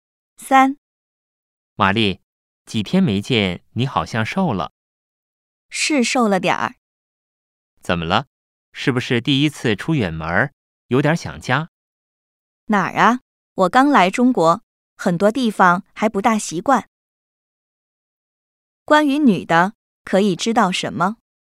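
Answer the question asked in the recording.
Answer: 她刚来中国,还不太习惯,瘦了点儿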